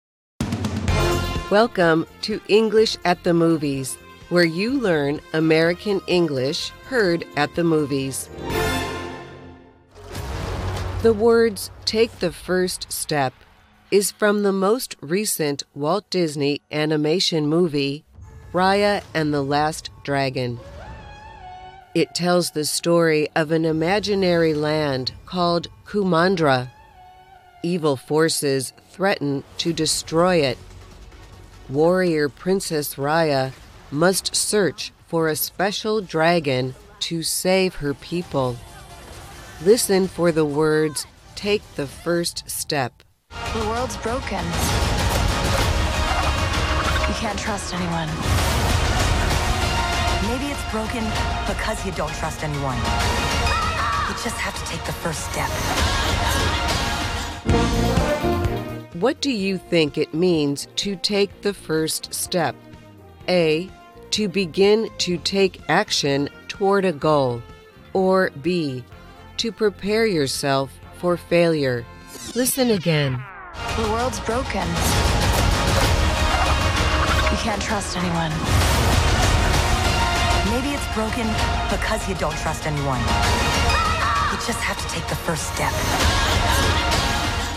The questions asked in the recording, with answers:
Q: What do you think it means to take the first step?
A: The answer is A. To take the first step is to begin to take action toward a goal.